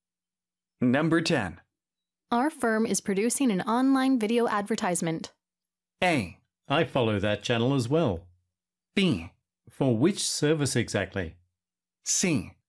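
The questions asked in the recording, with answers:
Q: Our firm is producing an online video advertisement.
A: B: For which service exactly?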